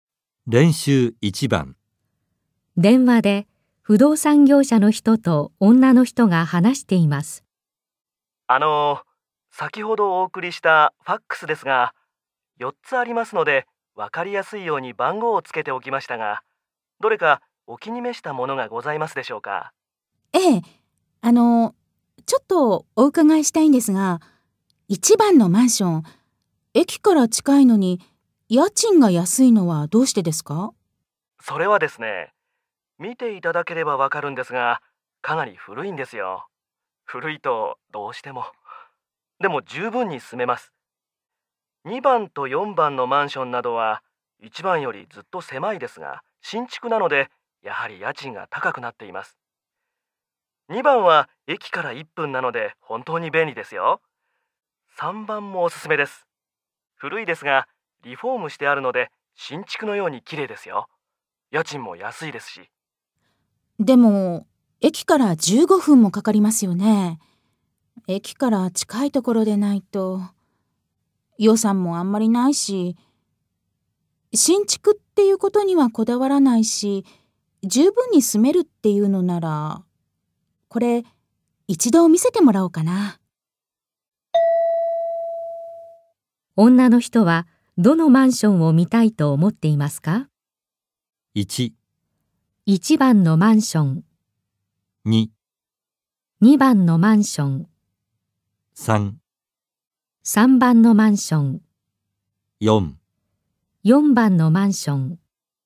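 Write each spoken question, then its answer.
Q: 女の人はどのマンションを見たいと思っていますか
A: 1: 1番のマンション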